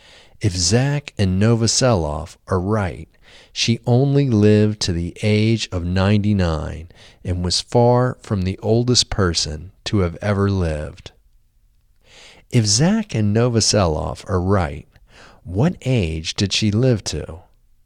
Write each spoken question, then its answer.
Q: If Zach and Novoselov are right, what age did she live to?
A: If Zach and Novoselov are right, she lived to the age of 99.